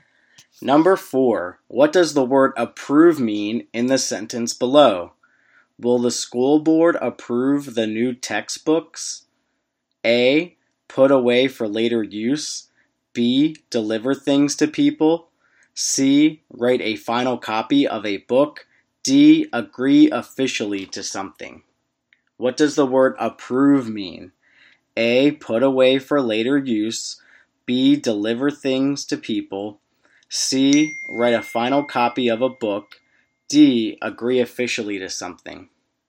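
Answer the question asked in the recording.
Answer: D: Agree officially to something.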